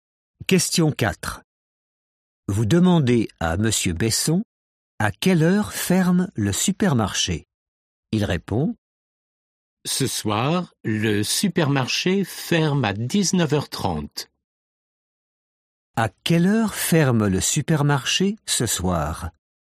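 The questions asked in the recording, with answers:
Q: À quelle heure ferme le supermarché ce soir?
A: à 19h30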